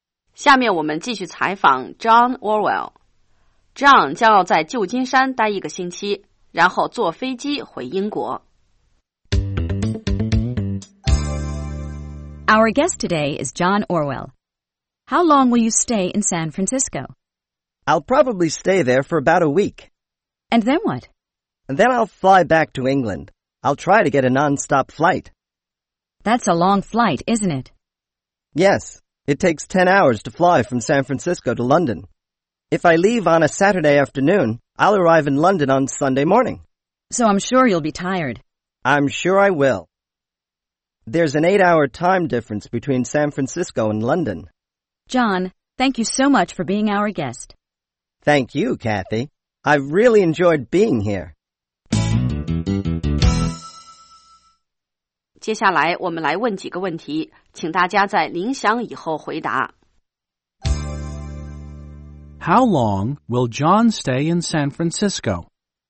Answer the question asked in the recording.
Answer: He'll probably stay there for about a week.